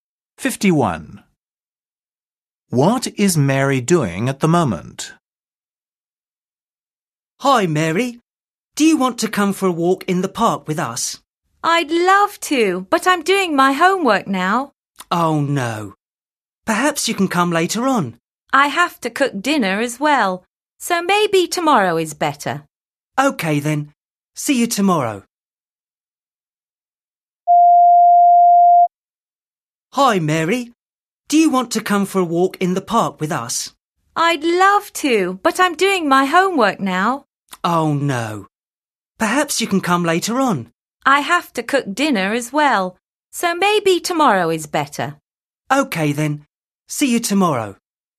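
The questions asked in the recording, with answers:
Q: What is Mary doing at the moment?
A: doing her homework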